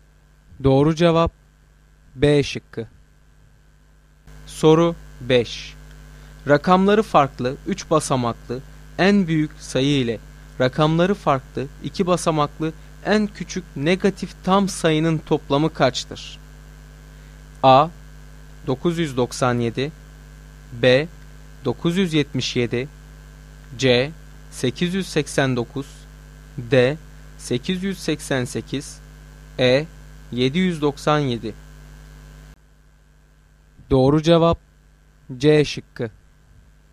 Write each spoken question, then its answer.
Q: Rakamları farklı 3 basamaklı en büyük sayı ile rakamları farklı 2 basamaklı en küçük negatif tam sayının toplamı kaçtır?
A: Doğru cevap C şıkkı.